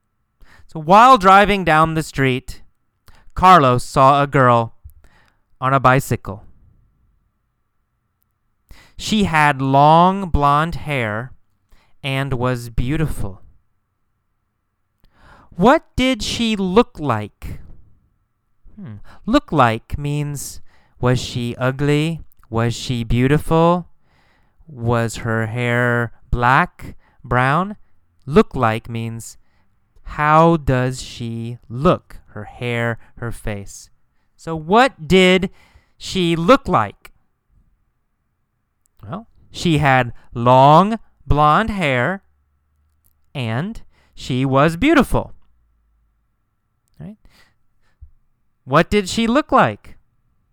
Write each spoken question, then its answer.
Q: What did she look like?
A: She had long blonde hair and she was beautiful.